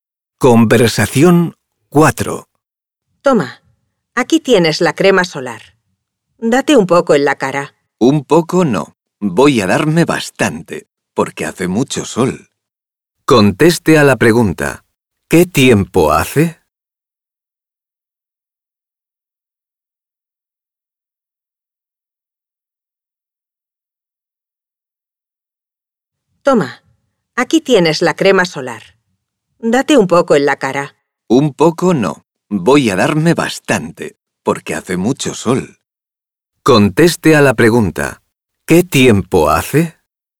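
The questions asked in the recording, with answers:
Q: ¿Qué tiempo hace?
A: Hace mucho sol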